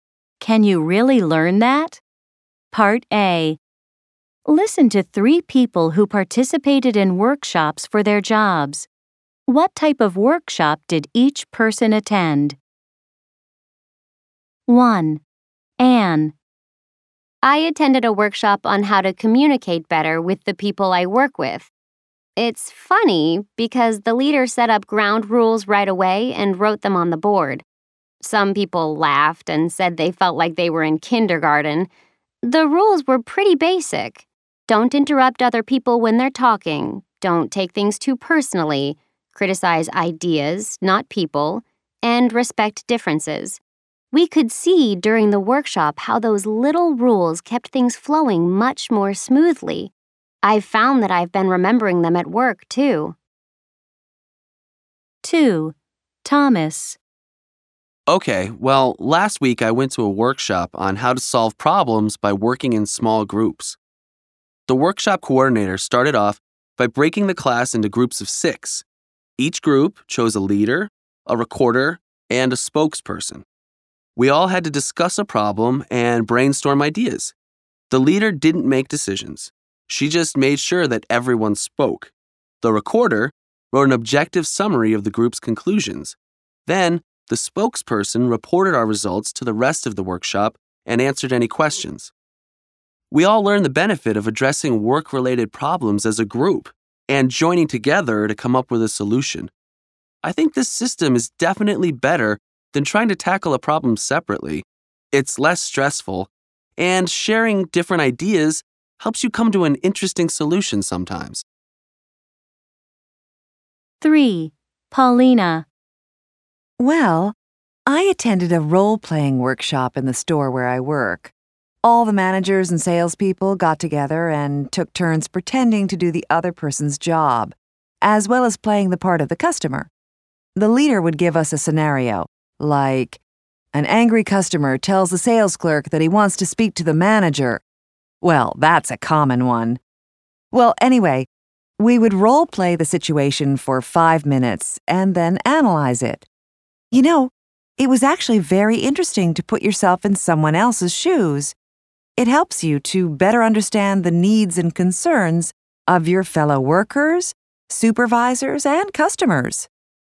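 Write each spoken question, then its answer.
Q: What type of workshop did each person attend? 1. Anne.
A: A workshop on how to communicate better with coworkers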